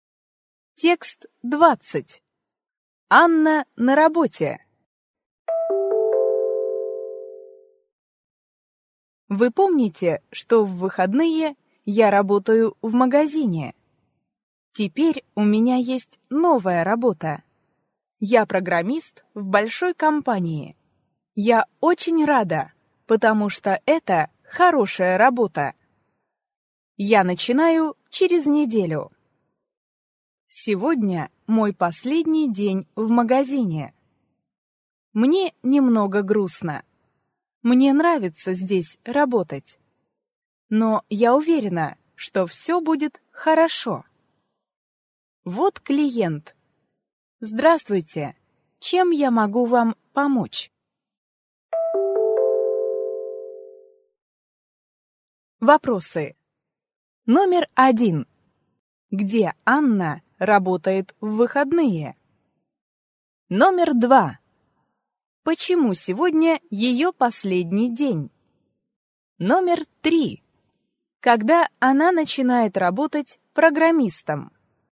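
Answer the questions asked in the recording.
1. В магазине
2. У неё новая работа программистом в большой компании
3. Через неделю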